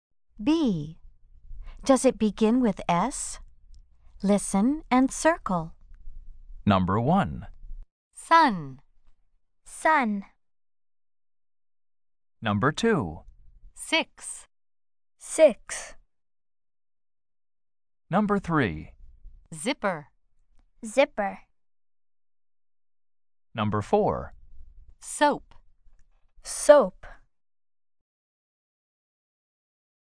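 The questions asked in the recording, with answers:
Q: Does it begin with S?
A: Yes (sun)

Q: Does it begin with S?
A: Yes (six)

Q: Does it begin with S?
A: No (zipper)

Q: Does it begin with S?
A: Yes (soap)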